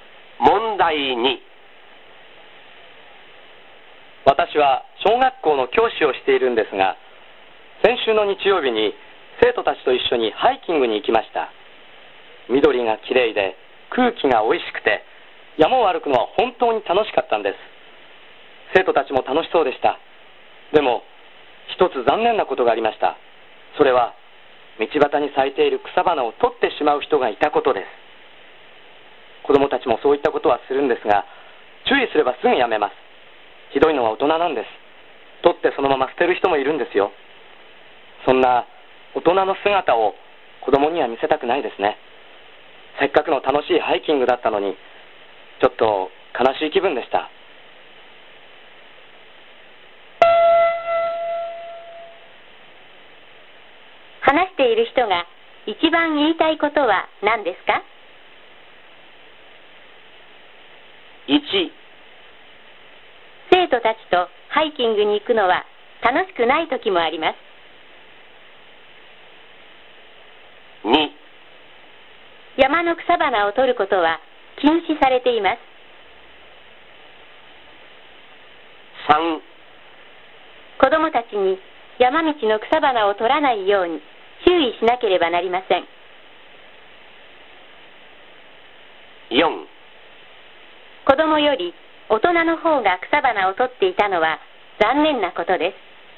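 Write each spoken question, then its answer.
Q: 話している人が一番言いたいことは何ですか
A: 4: 子どもより大人の方が草花を取っていたのは残念なことです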